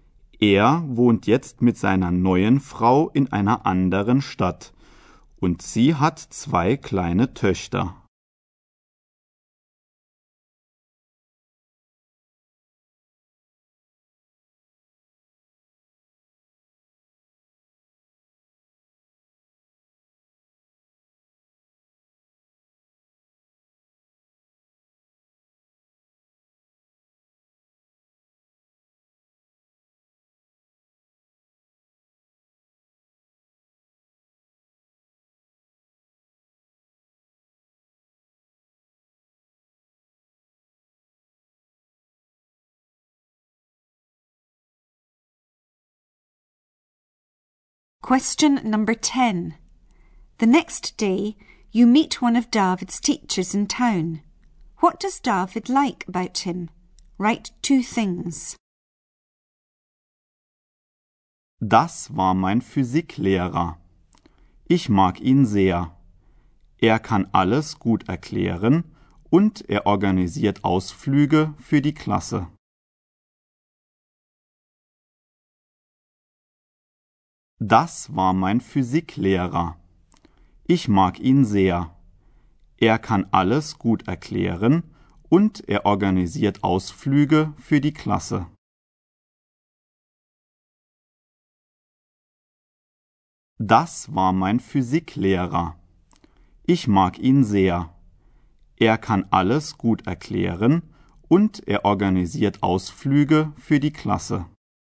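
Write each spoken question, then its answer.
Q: What does David like about him?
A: He explains everything well and organises trips for the class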